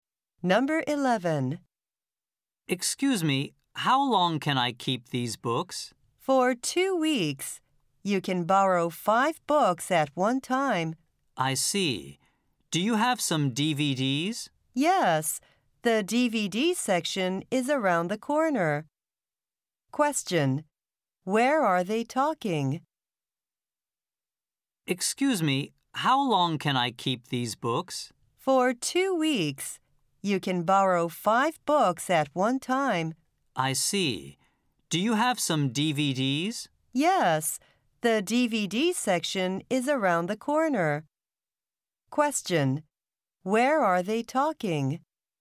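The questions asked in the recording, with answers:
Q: Where are they talking?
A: At a library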